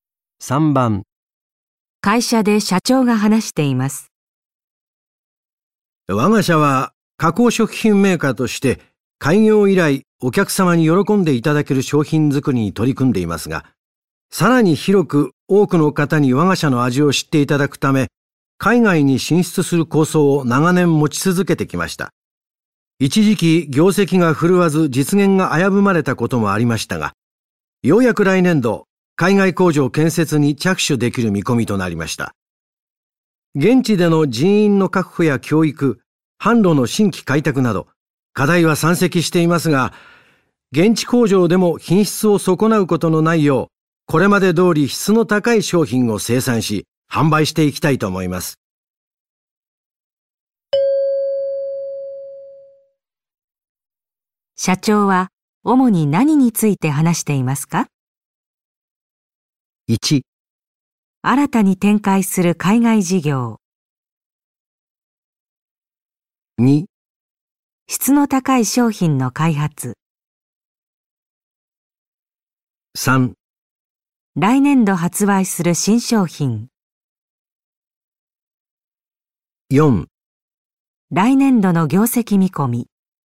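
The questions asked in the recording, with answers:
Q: 社長は主に何について話していますか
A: 1: 新たに展開する海外事業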